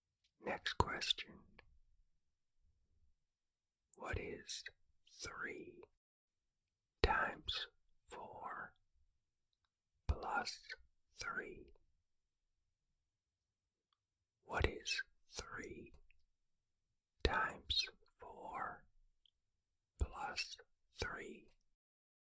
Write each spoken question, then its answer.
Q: What is 3 times 4 plus 3?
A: The answer is 15.